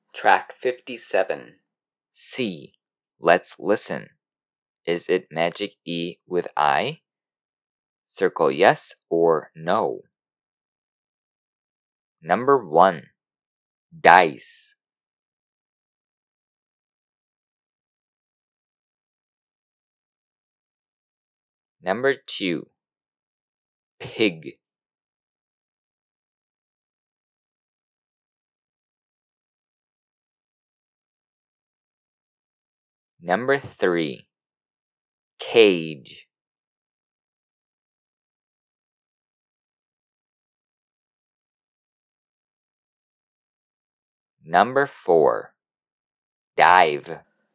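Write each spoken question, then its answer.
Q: Is it Magic E with I? Circle yes or no. Number 1. Dice.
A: yes

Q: Number 2. Pig.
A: no

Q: Number 3. Cage.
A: no

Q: Number 4. Dive.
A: yes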